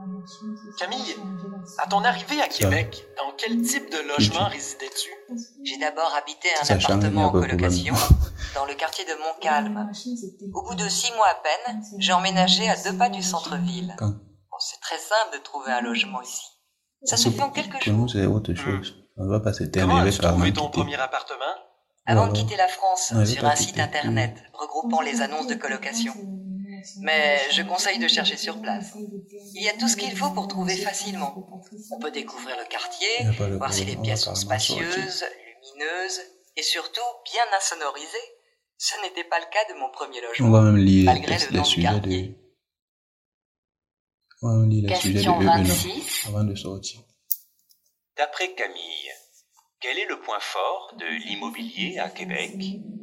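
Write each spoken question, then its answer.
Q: D'après Camille, quel est le point fort de l'immobilier à Québec?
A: On trouve facilement un logement en quelques jours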